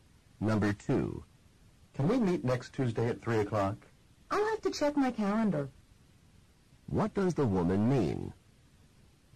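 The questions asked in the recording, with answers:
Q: What does the woman mean?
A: She is not sure if she is free then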